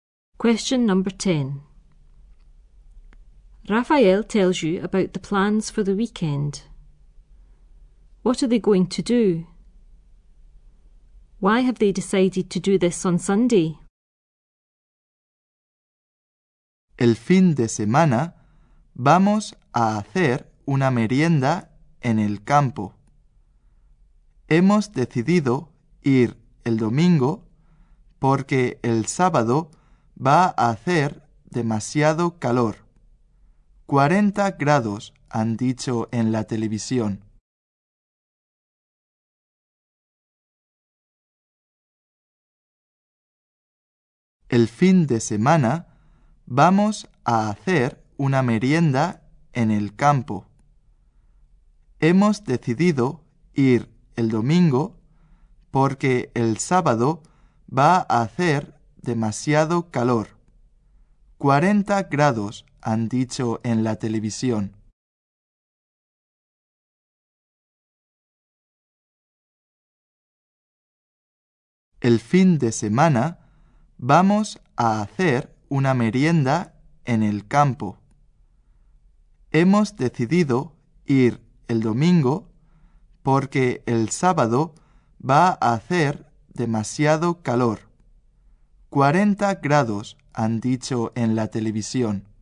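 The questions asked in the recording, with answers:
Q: What are they going to do?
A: Have a picnic in the country

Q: Why have they decided to do this on Sunday?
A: Saturday will be too hot (40 degrees)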